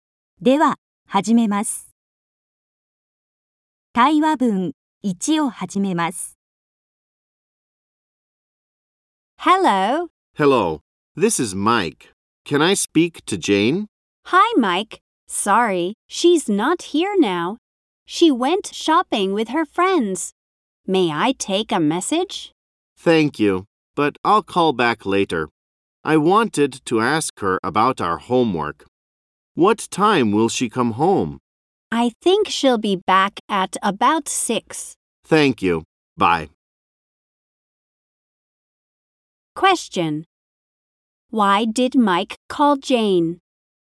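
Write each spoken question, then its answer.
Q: Why did Mike call Jane?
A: To ask her about their homework.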